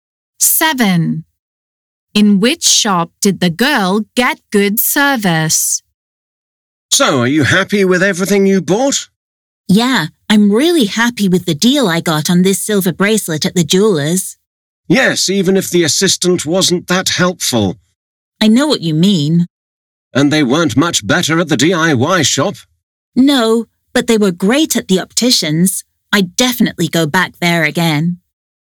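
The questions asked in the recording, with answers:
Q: In which shop did the girl get good service?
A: The optician's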